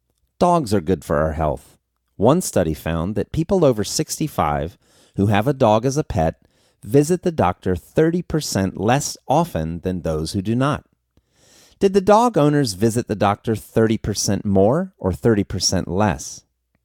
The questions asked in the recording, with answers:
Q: Did the dog owners visit the doctor 30% more or 30% less?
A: The dog owners visited the doctor 30% less.